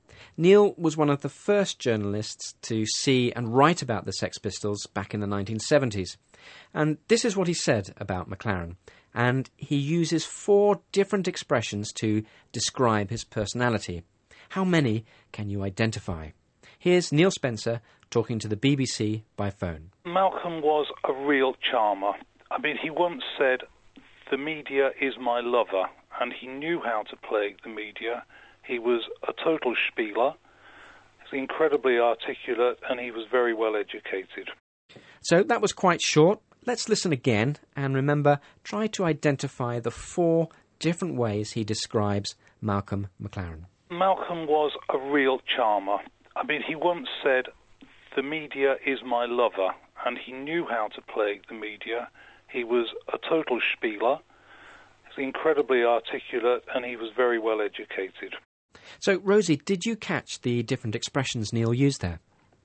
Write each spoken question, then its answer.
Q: And he uses 4 different expressions to describe his personality. How many can you identify?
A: We had a total charmer, a real spieler, incredibly articulate, and very well educated.